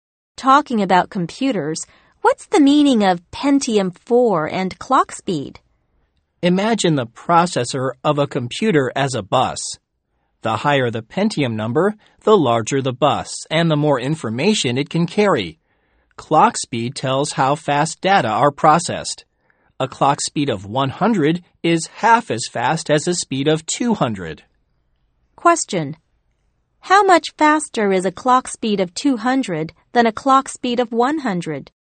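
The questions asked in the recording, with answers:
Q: How much faster is a clock speed of 200 than a clock speed of 100?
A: Twice as fast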